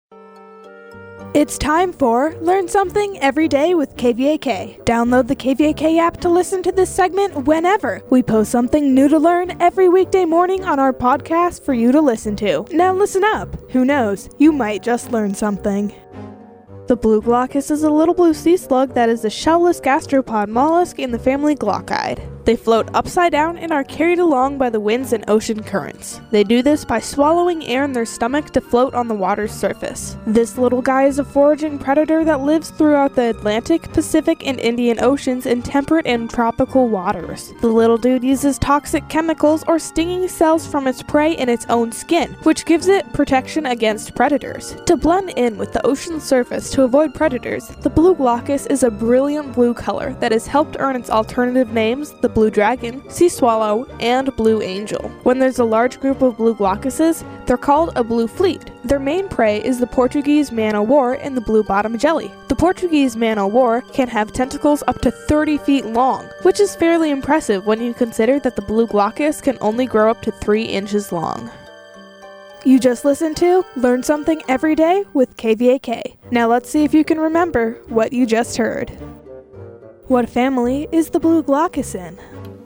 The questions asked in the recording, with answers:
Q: What family is the blue glaucus in?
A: It is in the family glauchidae.